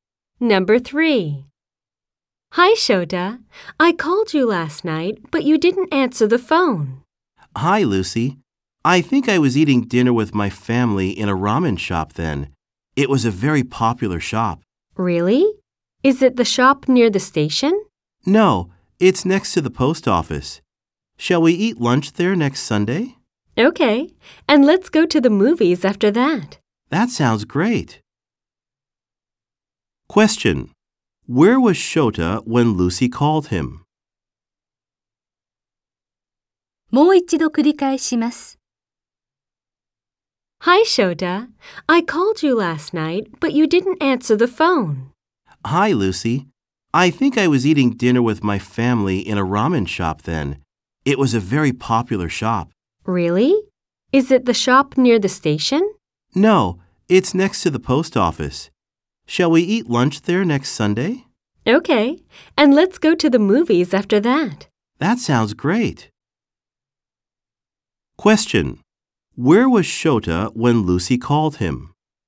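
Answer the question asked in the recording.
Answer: In a ramen shop next to the post office.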